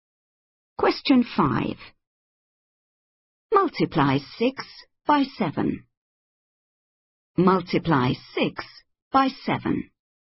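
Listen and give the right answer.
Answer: 42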